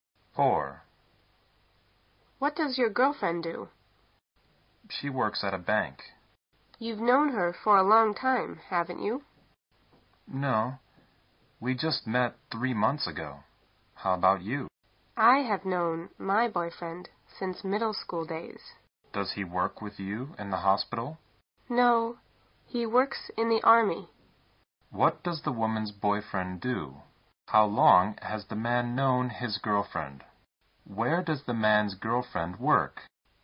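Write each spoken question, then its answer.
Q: What does the woman's boyfriend do?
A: He works in the army

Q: How long has the man known his girlfriend?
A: 3 months

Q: Where does the man's girlfriend work?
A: At a bank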